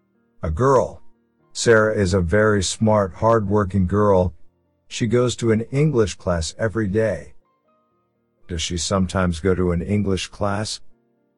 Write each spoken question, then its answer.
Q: Does she sometimes go to an English class?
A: No, she doesn't. She goes to an English class every day.